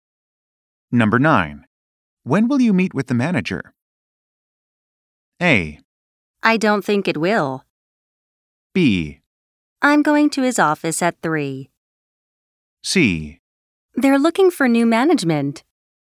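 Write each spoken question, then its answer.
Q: When will you meet with the manager?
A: B: I'm going to his office at 3.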